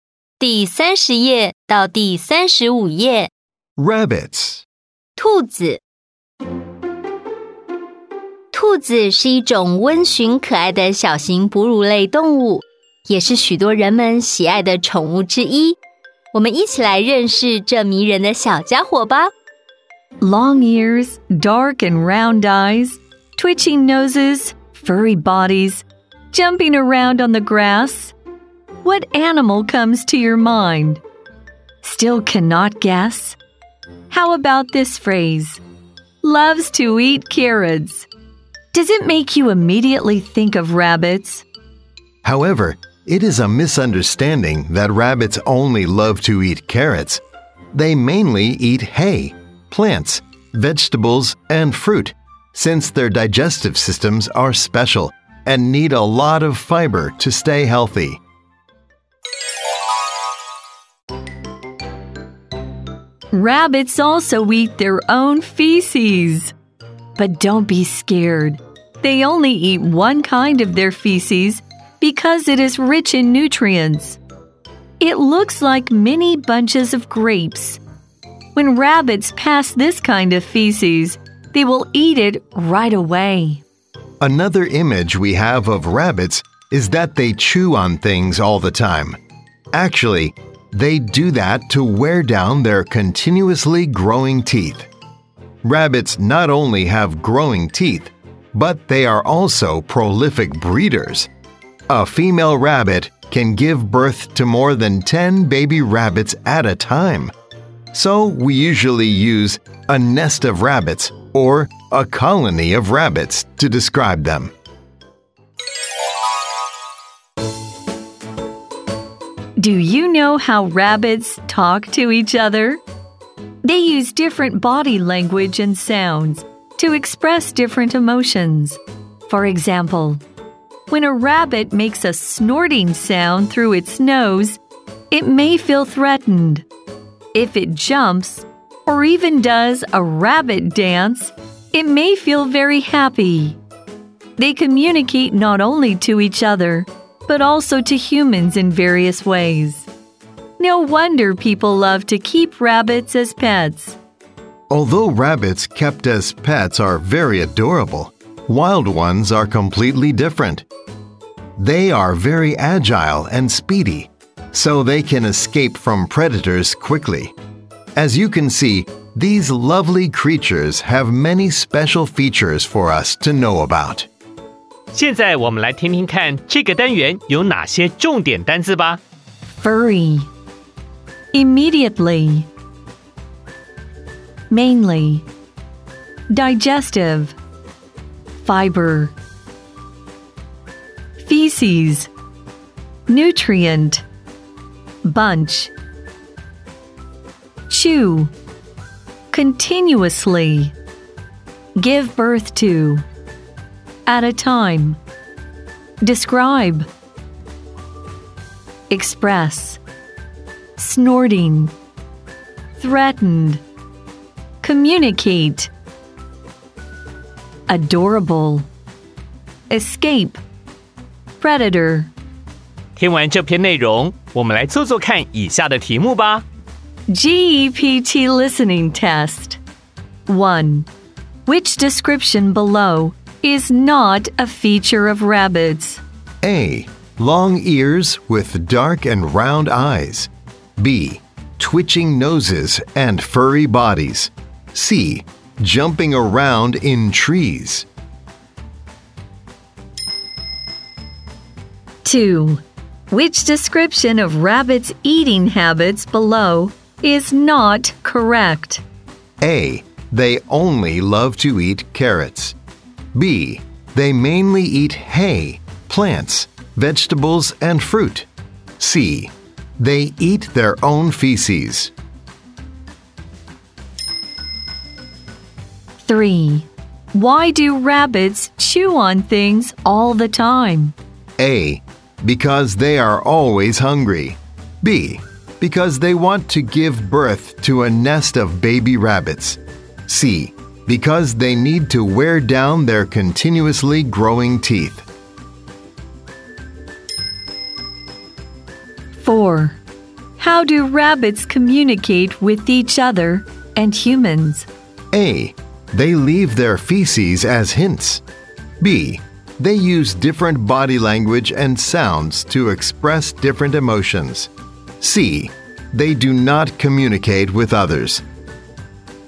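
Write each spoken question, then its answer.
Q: Which description of rabbits' eating habits below is not correct?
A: A: They only love to eat carrots.

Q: Why do rabbits chew on things all the time?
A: C: Because they need to wear down their continuously growing teeth.

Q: How do rabbits communicate with each other and humans?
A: B: They use different body language and sounds to express different emotions.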